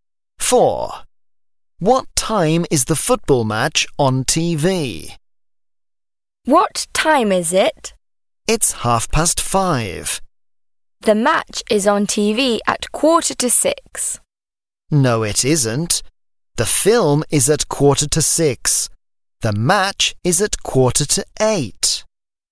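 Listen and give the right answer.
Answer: 7:45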